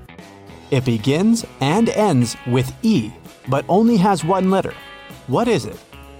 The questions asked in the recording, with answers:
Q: What is it?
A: The right answer is an envelope.